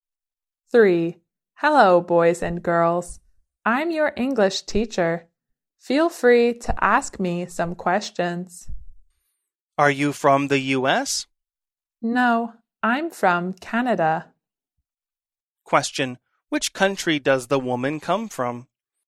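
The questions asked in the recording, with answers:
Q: Which country does the woman come from?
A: Canada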